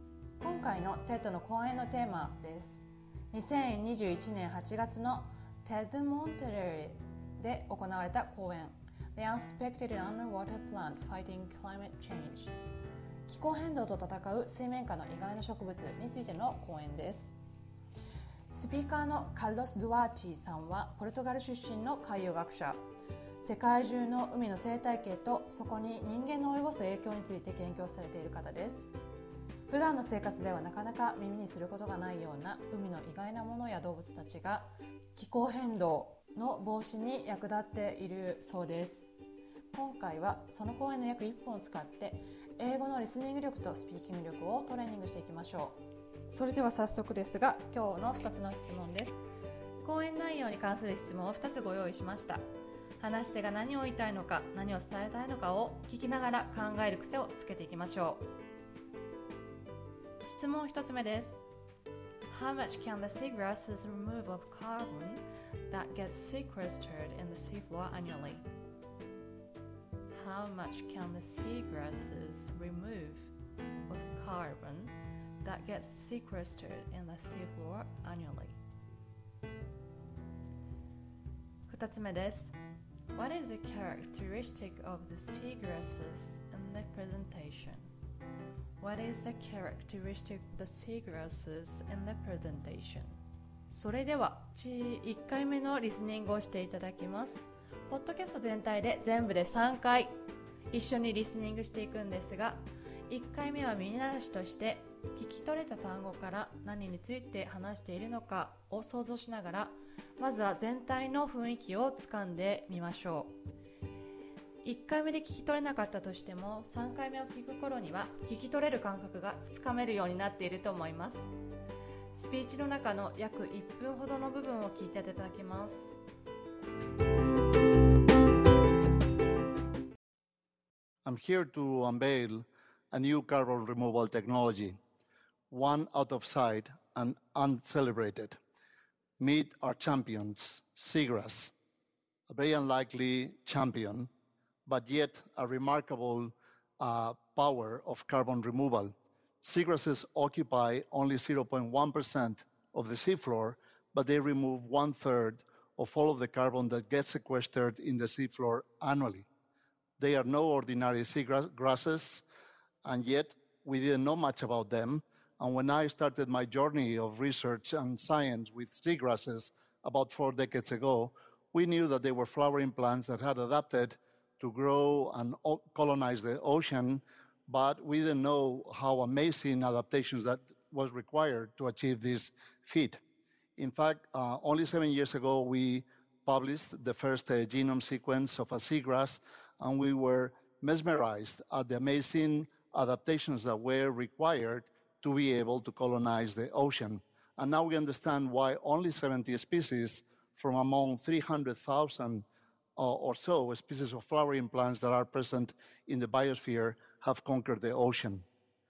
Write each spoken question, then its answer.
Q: How much can the seagrasses remove of carbon that gets sequestered in the seafloor annually?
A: Seagrasses occupy only 0.1% of the seafloor, but they remove one third of all the carbon that gets sequestered in the seafloor annually.

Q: What is a characteristic the seagrasses in the presentation?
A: They were flower, flowering plants that had adapted to grow and colonize the ocean.